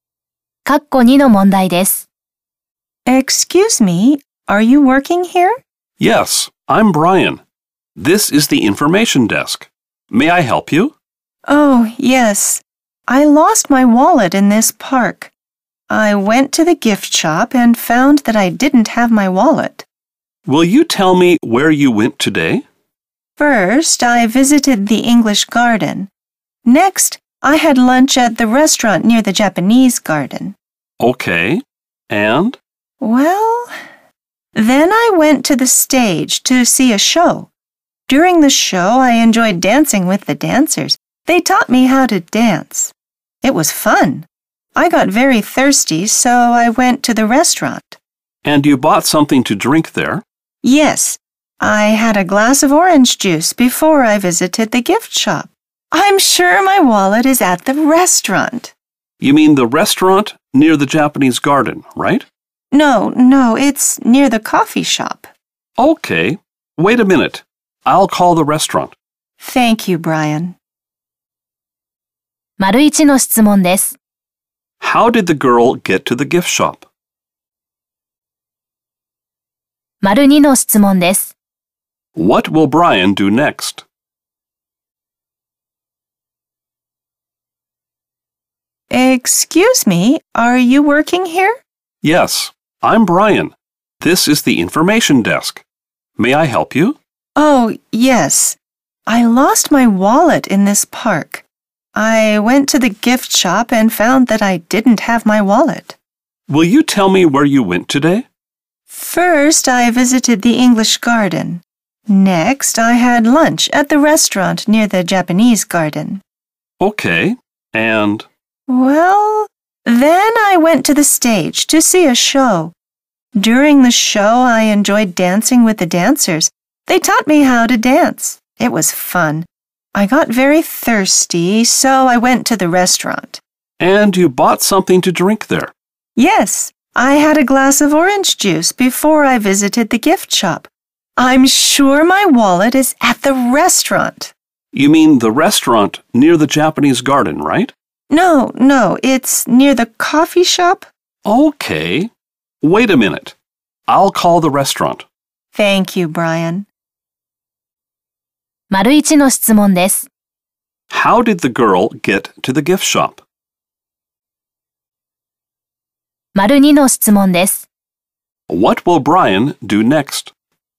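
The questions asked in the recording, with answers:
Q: How did the girl get to the gift shop?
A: English garden, restaurant near the Japanese garden, stage, restaurant near the coffee shop, then the gift shop.

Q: What will Brian do next?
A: Call the restaurant.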